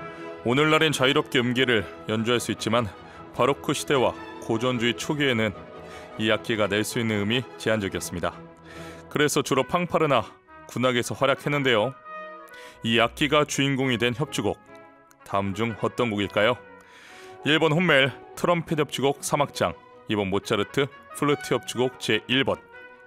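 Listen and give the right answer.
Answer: 1: 훗멜 트럼펫 협주곡 3악장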